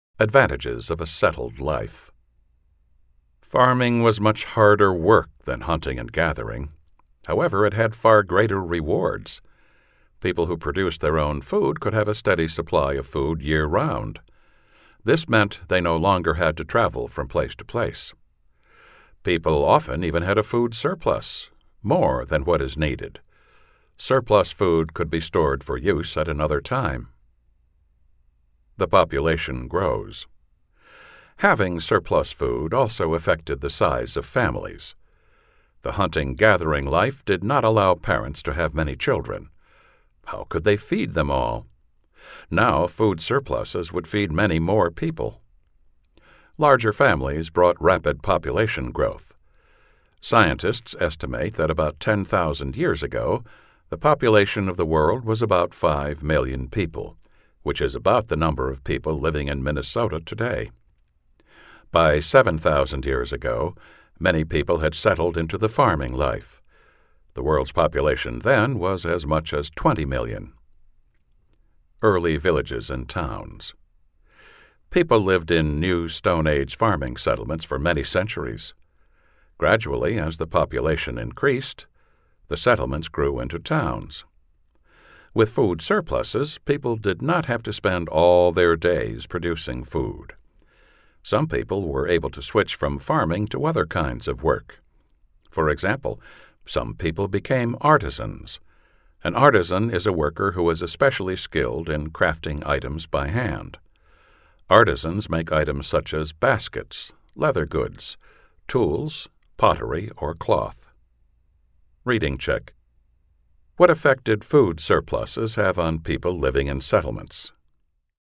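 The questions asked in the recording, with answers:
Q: What effect did food surpluses have on people living in settlements?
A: People no longer had to spend all their time producing food, so some switched to other work, such as becoming artisans.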